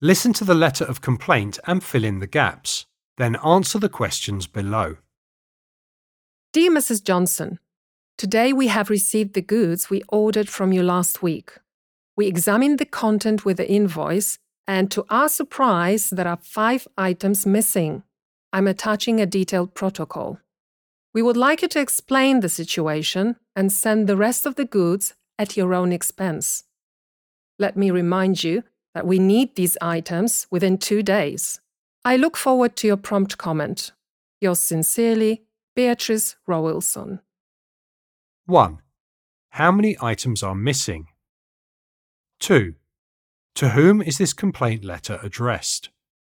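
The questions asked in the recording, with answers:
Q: To whom is this complaint letter addressed?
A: Mrs. Johnson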